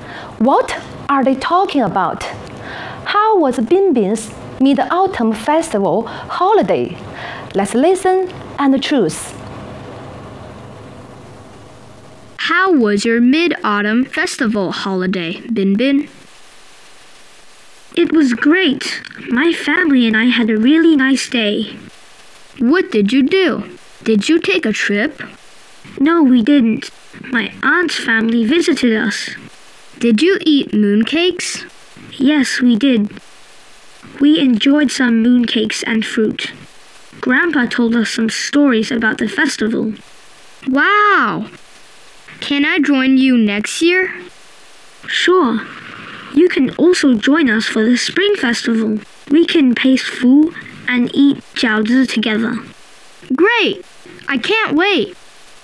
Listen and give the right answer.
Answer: Bingbing's Mid-Autumn Festival holiday was great!